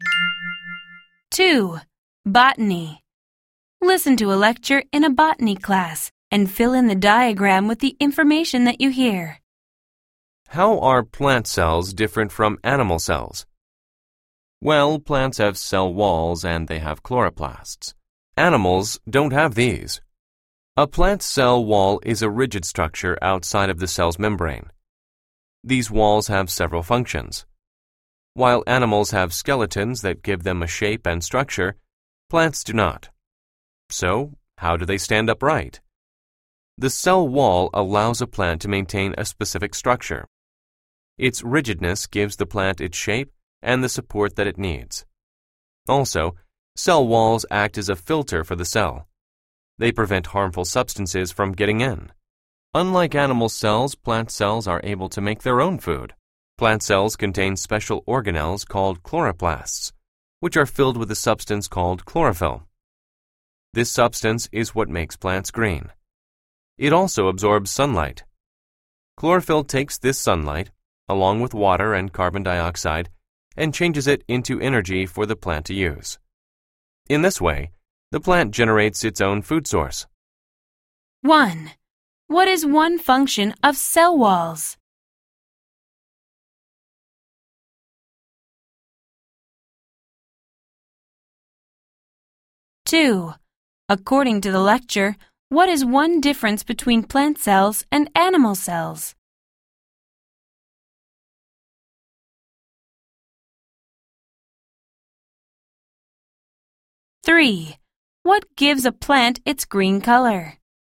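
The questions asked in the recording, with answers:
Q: What is one function of cell walls?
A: They give the plant its shape and support (and filter out harmful substances).

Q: According to the lecture, what is one difference between plant cells and animal cells?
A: Plant cells have cell walls and chloroplasts and can make their own food; animal cells can't.

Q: What gives a plant its green color?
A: Chlorophyll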